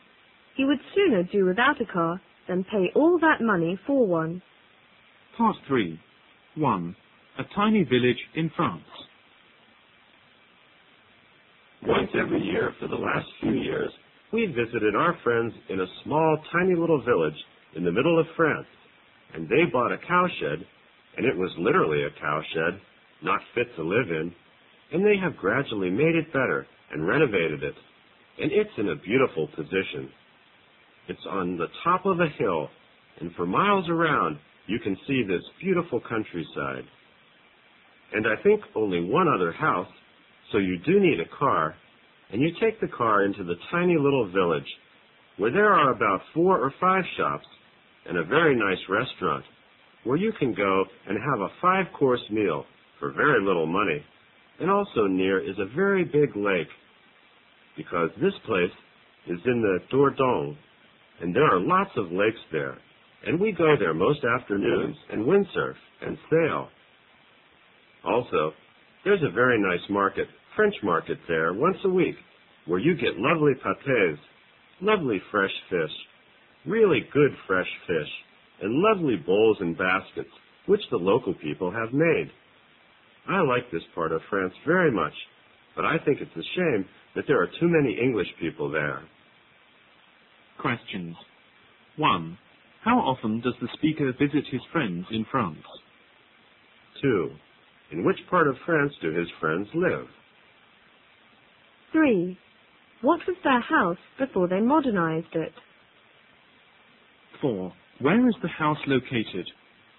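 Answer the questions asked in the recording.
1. Once every year
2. The Dordogne, in the middle of France
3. A cowshed
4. On the top of a hill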